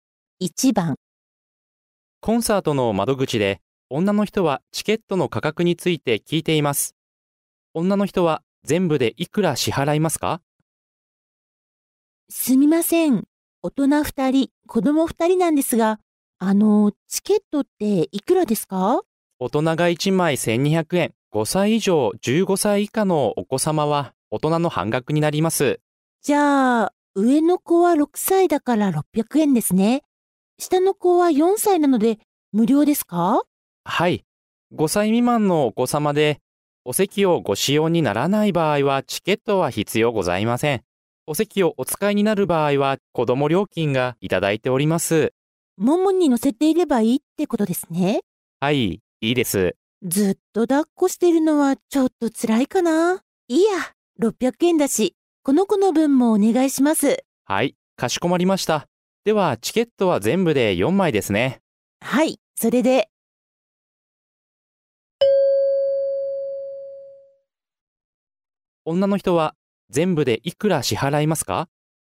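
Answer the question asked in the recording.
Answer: 3600円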